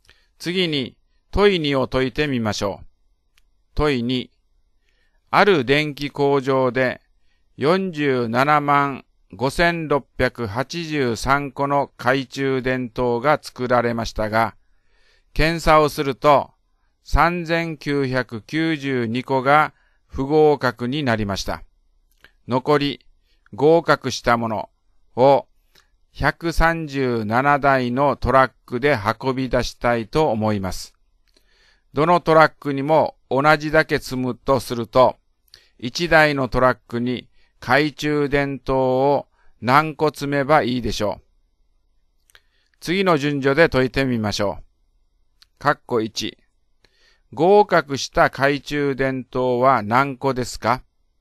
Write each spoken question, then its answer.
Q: 合格した懐中電灯は何個ですか?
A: 471691個が合格したのです